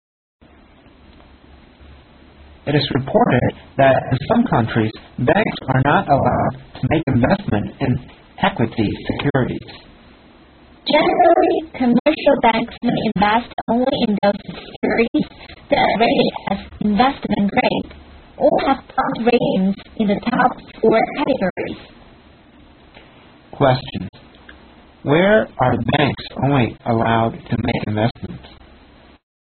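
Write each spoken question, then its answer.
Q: Where are banks only allowed to make investments?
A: In securities rated investment grade or in the top four bond rating categories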